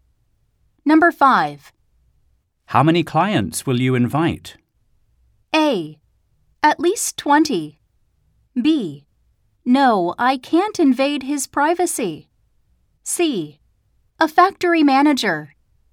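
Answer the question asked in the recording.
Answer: A: At least 20.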